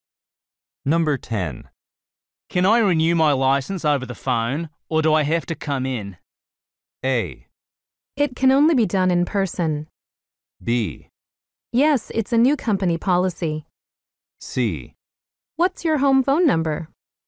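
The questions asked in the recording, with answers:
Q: Can I renew my license over the phone, or do I have to come in?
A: A: It can only be done in person.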